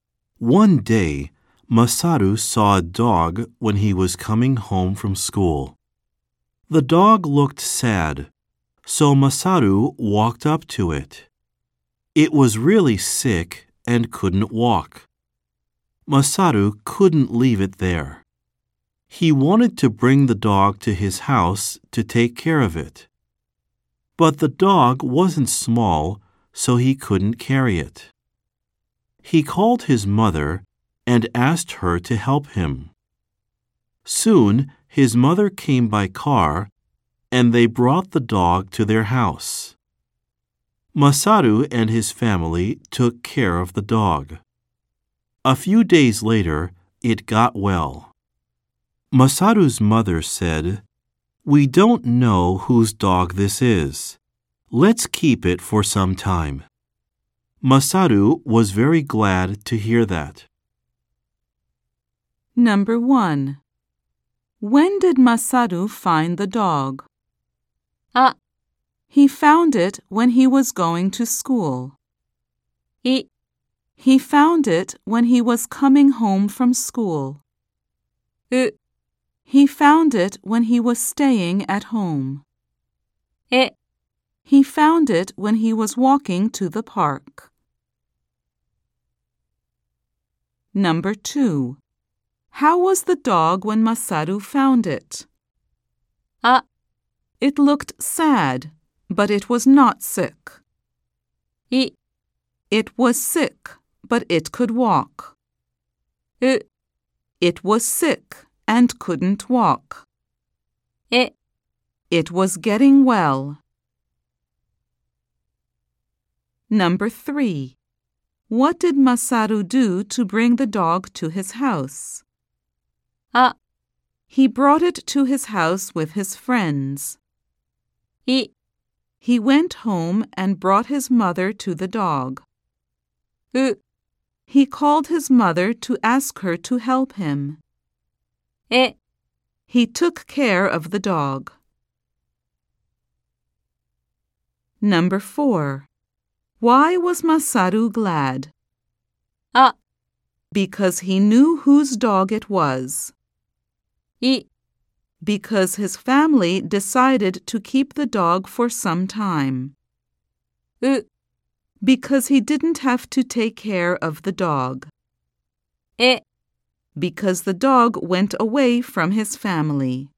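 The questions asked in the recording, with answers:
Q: When did Masaru find the dog?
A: い: He found it when he was coming home from school.

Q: How was the dog when Masaru found it?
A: う: It was sick and couldn't walk.

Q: What did Masaru do to bring the dog to his house?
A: う: He called his mother to ask her to help him.

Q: Why was Masaru glad?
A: い: Because his family decided to keep the dog for some time.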